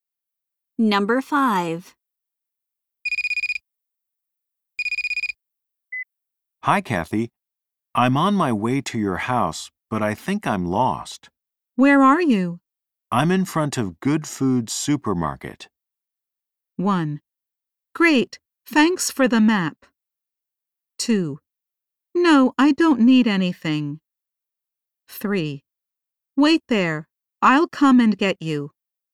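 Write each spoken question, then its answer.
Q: I'm in front of Good Food Supermarket.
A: 3: Wait there, I'll come and get you.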